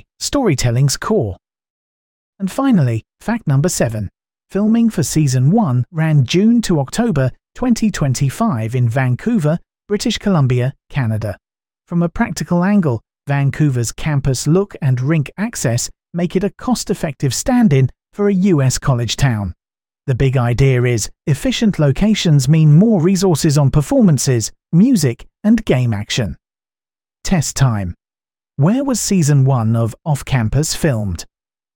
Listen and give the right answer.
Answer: Vancouver, British Columbia.